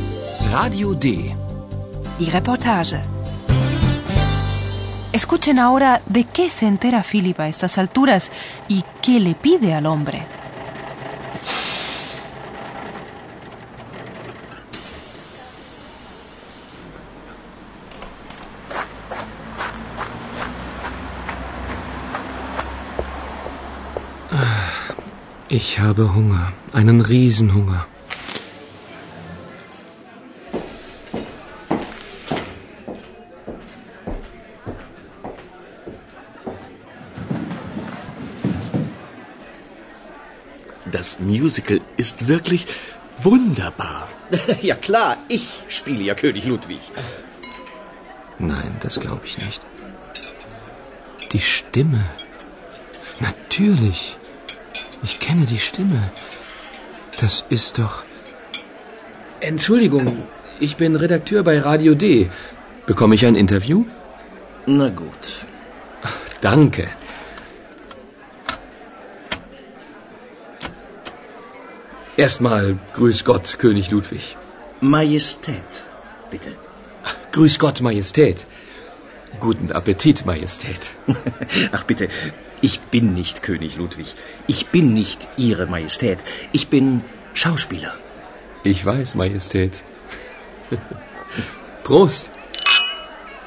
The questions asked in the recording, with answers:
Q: Escuchen ahora de qué se entera Philip a estas alturas y qué le pide al hombre.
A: Philip se presenta como redactor de Radio D y le pide al señor una entrevista.